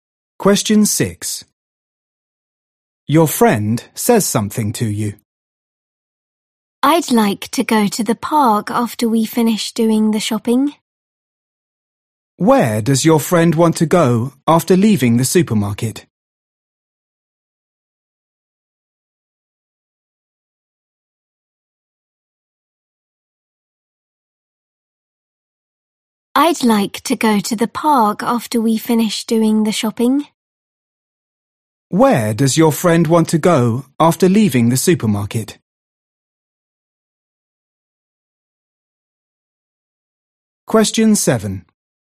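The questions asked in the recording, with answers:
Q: Where does your friend want to go after leaving the supermarket?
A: the park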